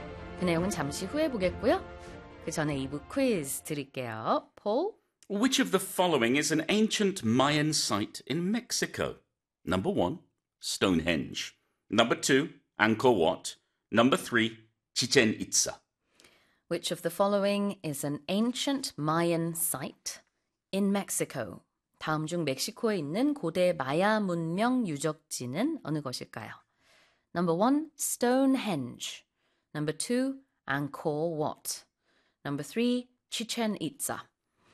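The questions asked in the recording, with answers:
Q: Which of the following is an ancient Mayan site in Mexico?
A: 3: Chichen Itza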